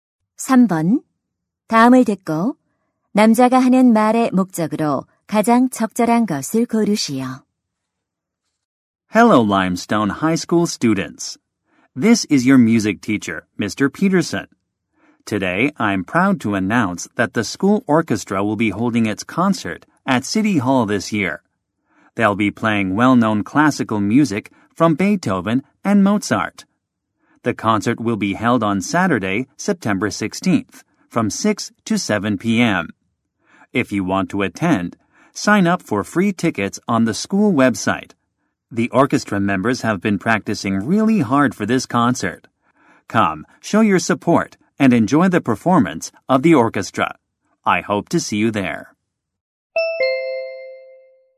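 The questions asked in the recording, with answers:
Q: 다음을 듣고 남자가 하는 말의 목적으로 가장 적절한 것을 고르시오.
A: 학교 오케스트라 연주회를 홍보하려고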